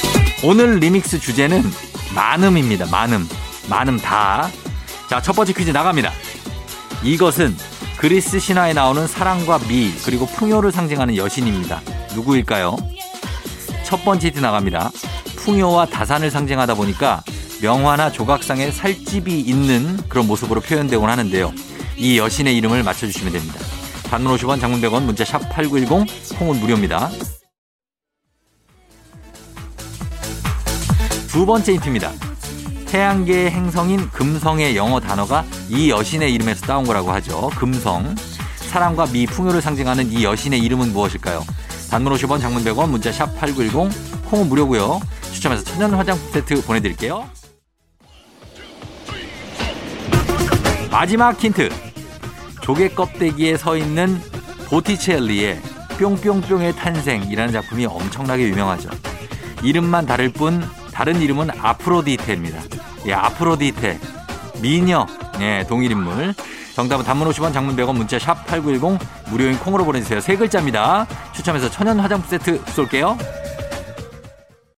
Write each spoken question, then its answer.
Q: 금성. 사랑과 미, 풍요를 상징하는 이 여신의 이름은 무엇일까요?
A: 비너스죠, 비너스. 예, 비너스. 정답이었습니다.